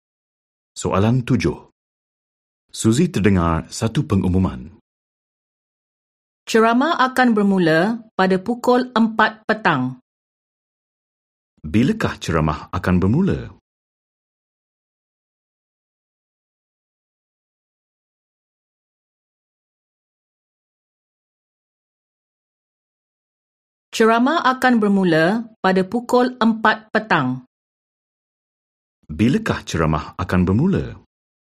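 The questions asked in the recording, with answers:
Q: Bilakah ceramah akan bermula?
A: Pukul 4 petang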